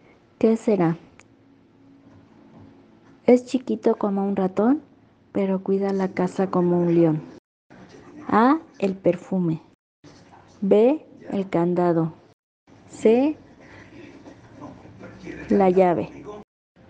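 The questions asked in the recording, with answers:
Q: Es chiquito como un ratón, pero cuida la casa como un león.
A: B: El candado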